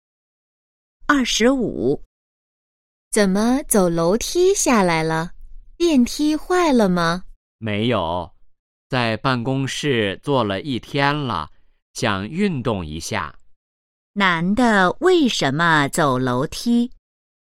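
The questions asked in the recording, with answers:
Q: 男的为什么走楼梯?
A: 想运动一下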